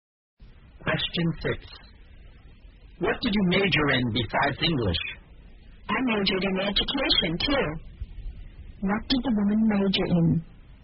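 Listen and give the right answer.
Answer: English and education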